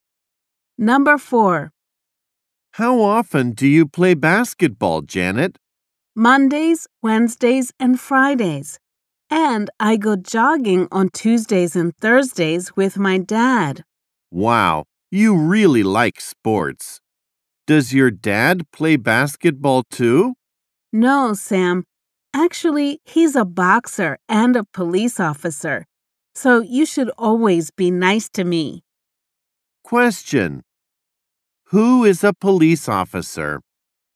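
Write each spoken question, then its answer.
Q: Who is a police officer?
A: Janet's dad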